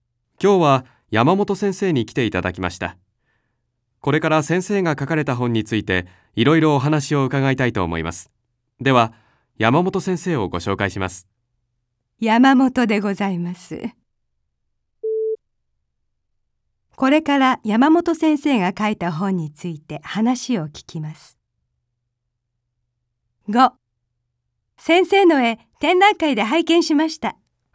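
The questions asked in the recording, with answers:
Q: これから山本先生が書いた本について話を聞きます。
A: ○(正しい)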